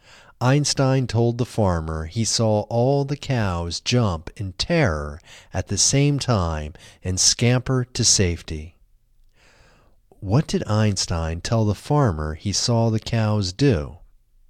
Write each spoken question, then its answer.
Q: What did Einstein tell the farmer he saw the cows do?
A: Einstein told the farmer he saw all the cows jump in terror at the same time and scamper to safety.